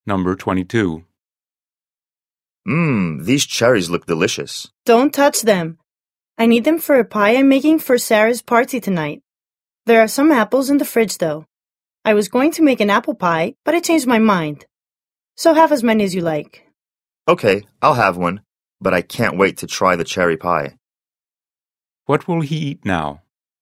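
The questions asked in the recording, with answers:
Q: What will he eat now?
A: an apple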